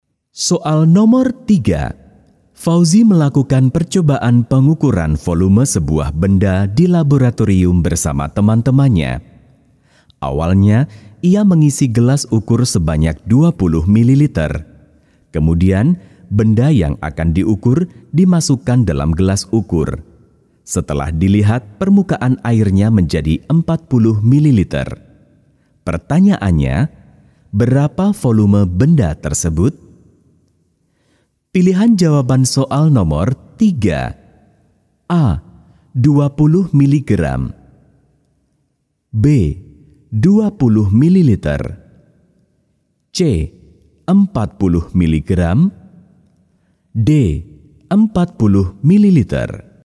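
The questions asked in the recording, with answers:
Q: Pertanyaannya, berapa volume benda tersebut?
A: B: 20 ml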